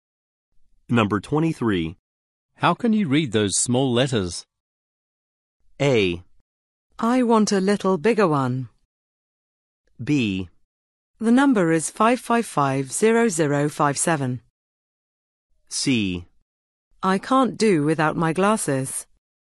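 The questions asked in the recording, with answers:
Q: How can you read those small letters?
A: C: I can't do without my glasses.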